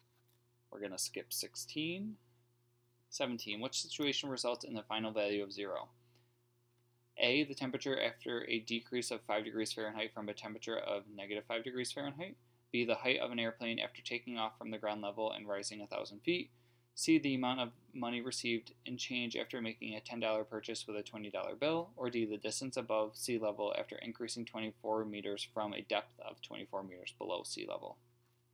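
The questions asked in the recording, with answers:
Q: Which situation results in the final value of 0?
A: D: the distance above sea level after increasing 24 meters from a depth of 24 meters below sea level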